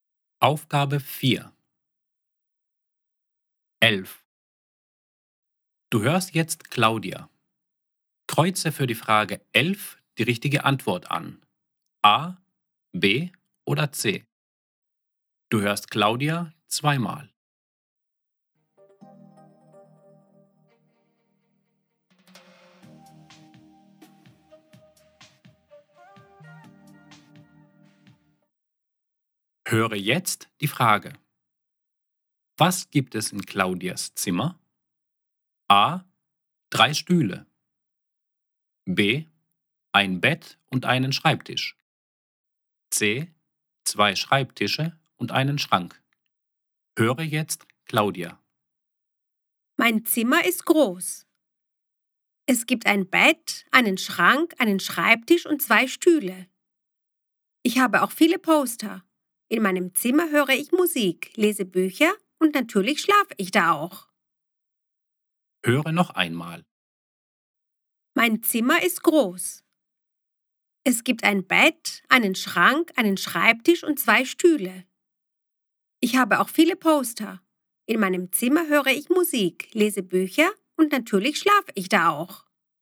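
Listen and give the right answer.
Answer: B: Ein Bett und einen Schreibtisch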